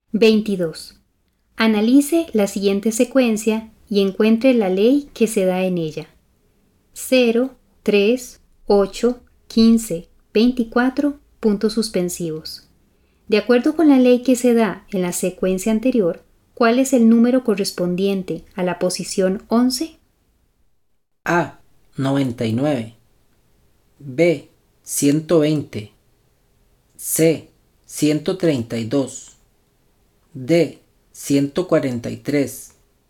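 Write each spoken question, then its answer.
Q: De acuerdo con la ley que se da en la secuencia anterior, ¿cuál es el número correspondiente a la posición 11?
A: B: 120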